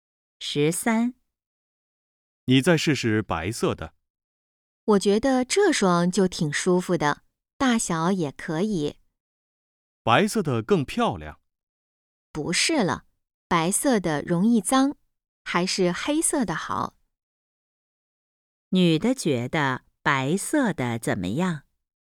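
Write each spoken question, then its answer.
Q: 女的觉得白色的怎么样?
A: 更漂亮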